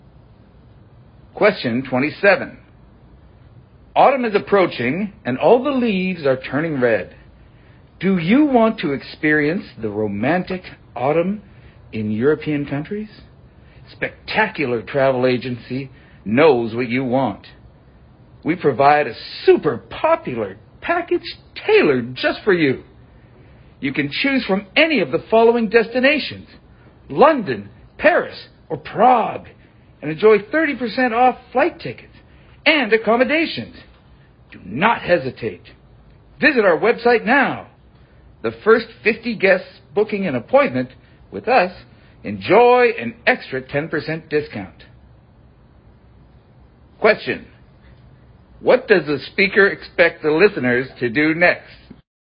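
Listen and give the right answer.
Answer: Visit the travel agency's website (and book a trip)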